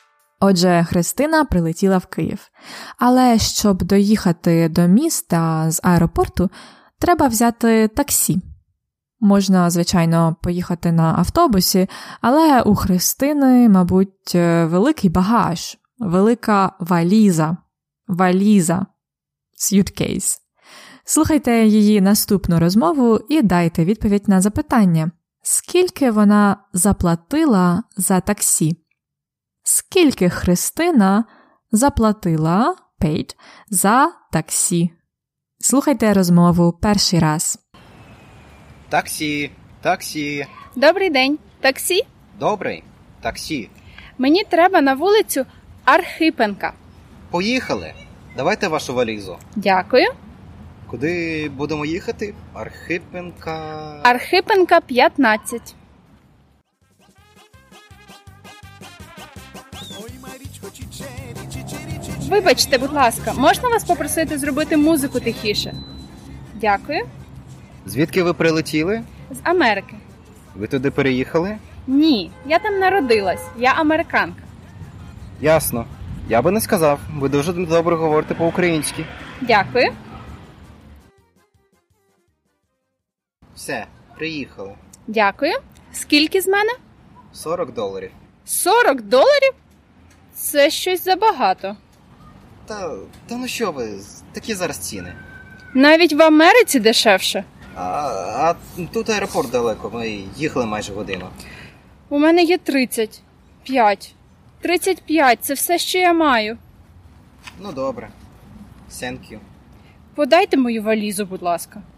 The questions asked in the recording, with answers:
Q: скільки вона заплатила за таксі, скільки Христина заплатила paid, за таксі.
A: вона заплатила за таксі 35 доларів.